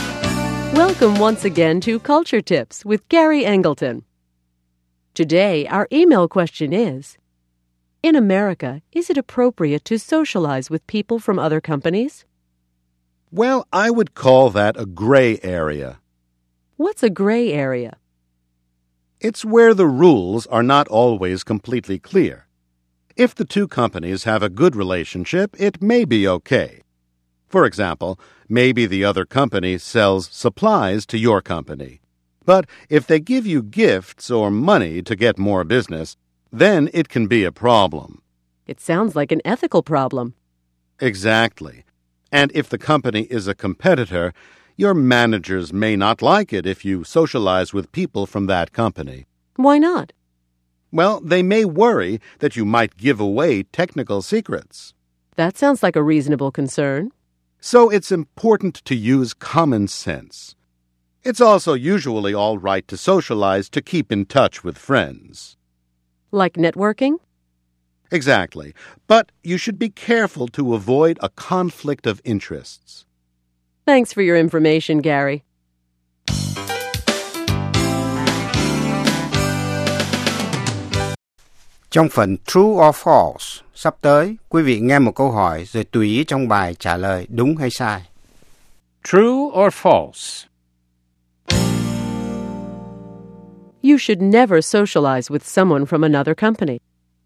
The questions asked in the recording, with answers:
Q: You should never socialize with someone from another company.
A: False. Sometimes it can help your company.